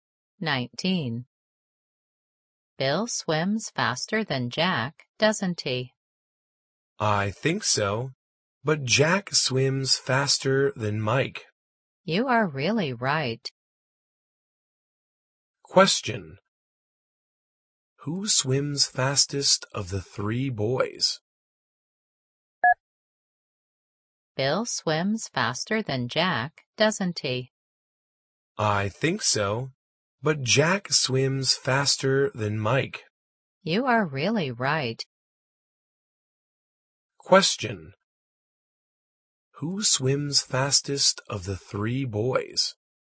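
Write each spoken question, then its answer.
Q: Who swims fastest of the 3 boys?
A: Bill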